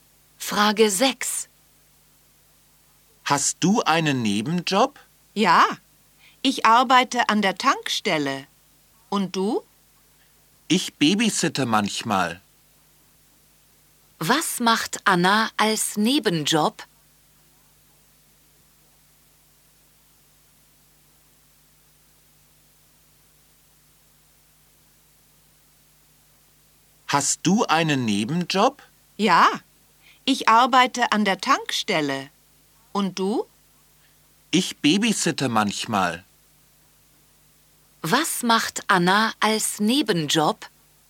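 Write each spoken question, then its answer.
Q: Was macht Anna als Nebenjob?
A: Sie babysittet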